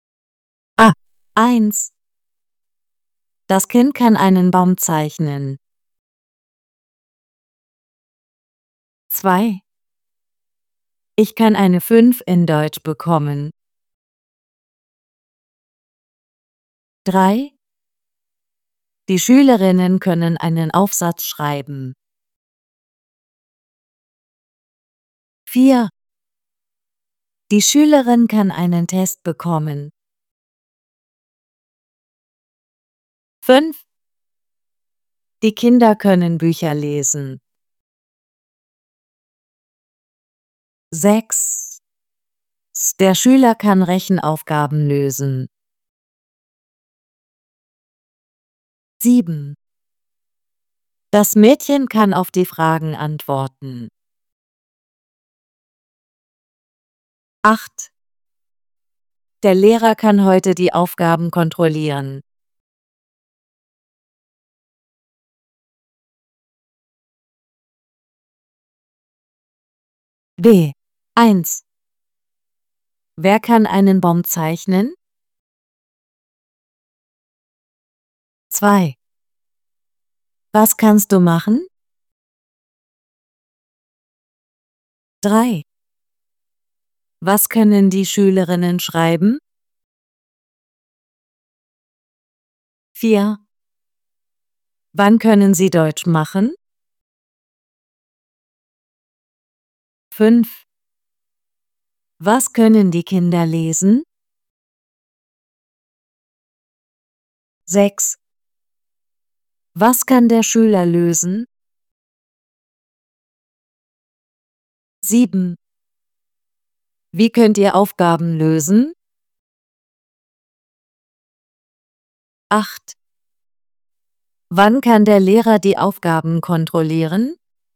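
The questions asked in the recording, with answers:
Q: Wer kann einen Baum zeichnen?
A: Das Kind

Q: Was kannst du machen?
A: Eine 5 in Deutsch bekommen

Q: Was können die Schülerinnen schreiben?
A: Einen Aufsatz

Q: Was können die Kinder lesen?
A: Bücher

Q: Was kann der Schüler lösen?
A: Rechenaufgaben

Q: Wann kann der Lehrer die Aufgaben kontrollieren?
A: Heute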